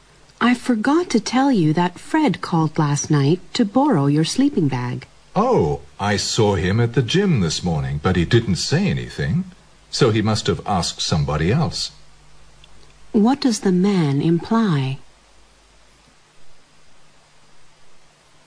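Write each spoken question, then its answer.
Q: What does the man imply?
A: Fred probably borrowed a sleeping bag from someone else.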